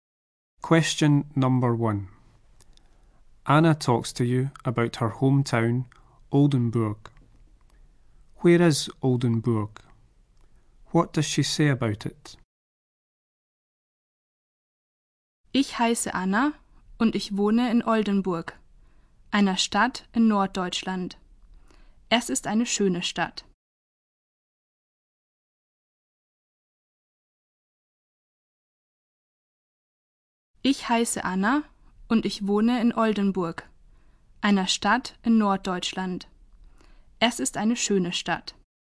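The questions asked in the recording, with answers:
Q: Where is Oldenburg?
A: In the north of Germany

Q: What does she say about it?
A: It is a beautiful town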